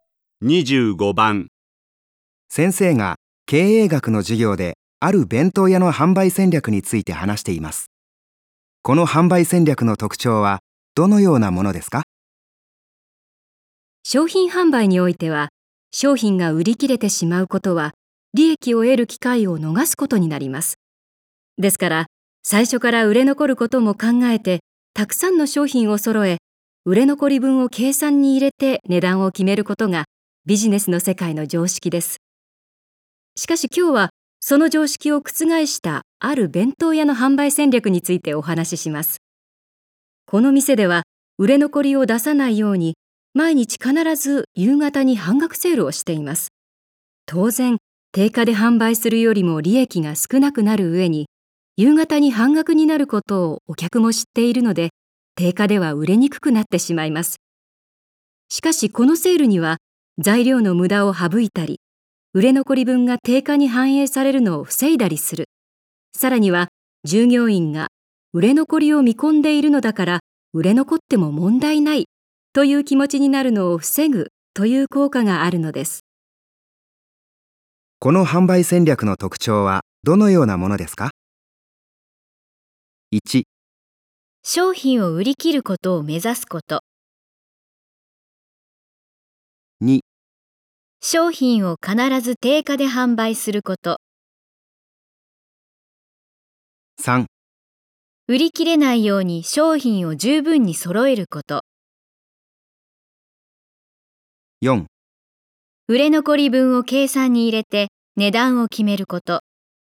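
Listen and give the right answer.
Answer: 1: 商品を売り切ることを目指すこと。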